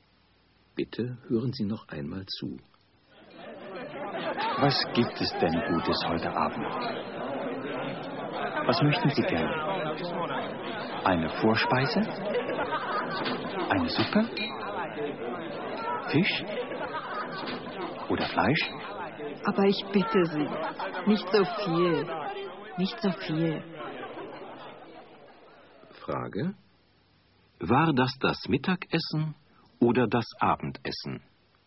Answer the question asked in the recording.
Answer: Das war das Abendessen.